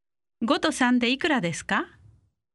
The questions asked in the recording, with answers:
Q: 5と3でいくらですか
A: 8 8